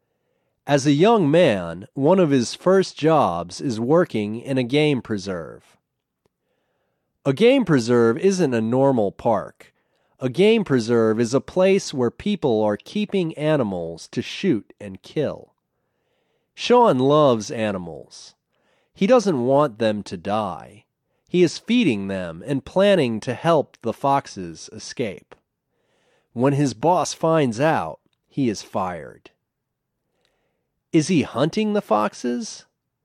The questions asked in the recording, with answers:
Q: Is he hunting the foxes?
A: No, he's not hunting the foxes.